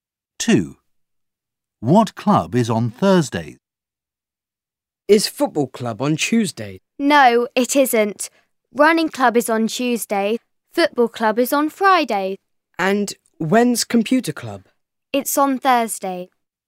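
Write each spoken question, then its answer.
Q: What club is on Thursday?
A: Computer club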